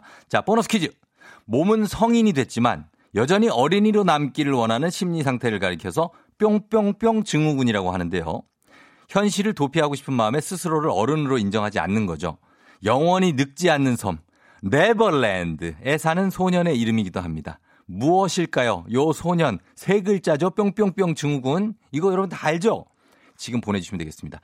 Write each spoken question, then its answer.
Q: 무엇일까요? 요 소년, 세 글자죠? 뿅뿅뿅 증후군.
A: 피터팬 증후군입니다